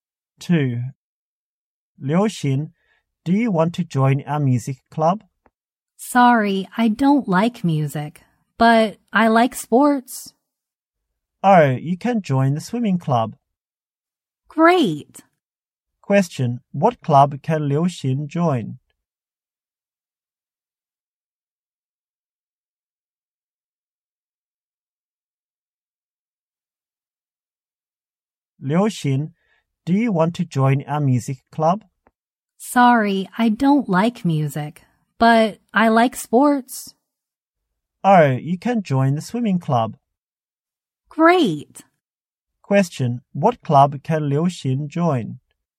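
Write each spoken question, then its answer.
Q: what club can Liu Xin join?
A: The swimming club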